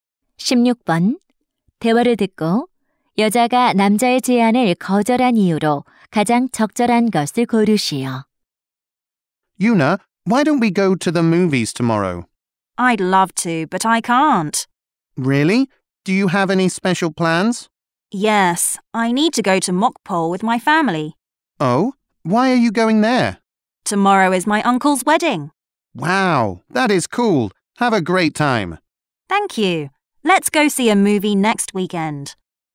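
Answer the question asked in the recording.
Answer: 삼촌의 결혼식에 가야 해서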